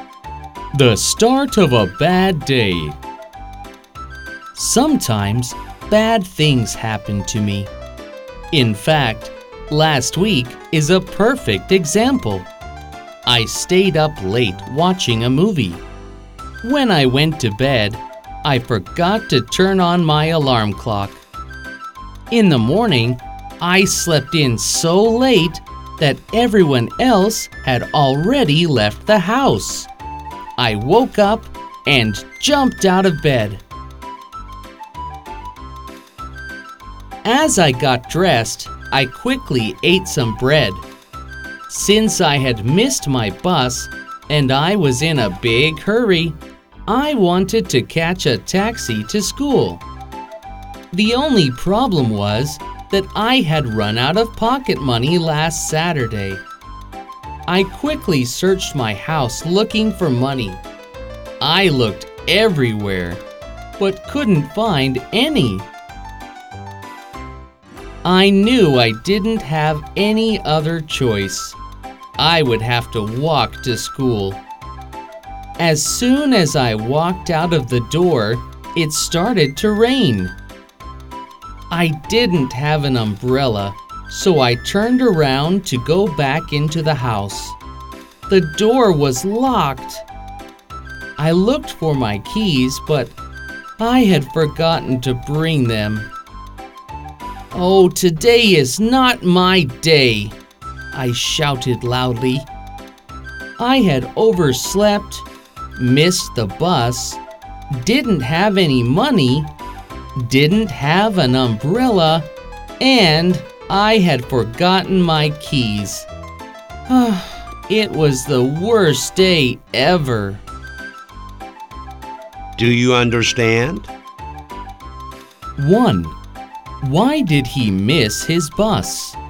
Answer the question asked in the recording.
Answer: He overslept, so he missed his bus.